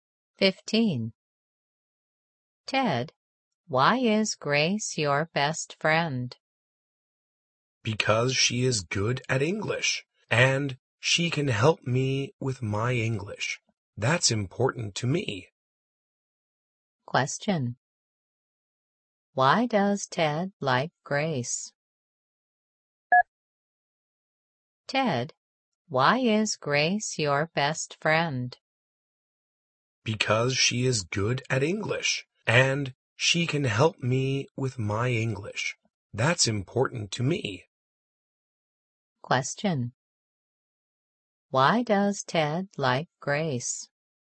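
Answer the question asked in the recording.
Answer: She is good at English and can help him with his English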